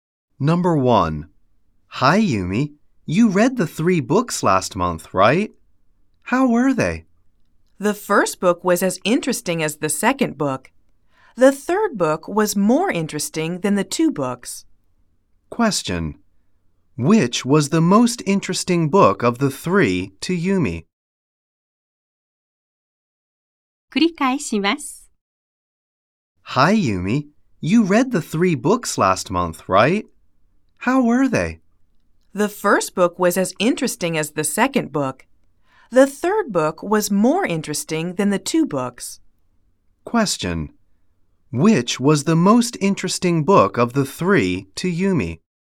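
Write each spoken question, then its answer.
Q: Which was the most interesting book of the 3 to Yumi?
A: The third book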